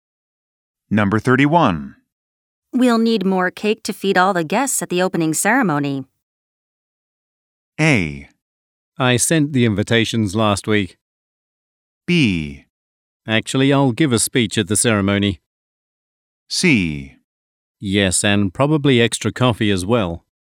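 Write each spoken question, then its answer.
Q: We'll need more cake to feed all the guests at the opening ceremony.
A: C: Yes, and probably extra coffee as well.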